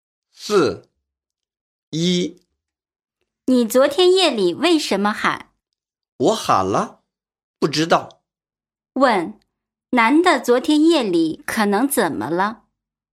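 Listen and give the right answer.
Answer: 说梦话了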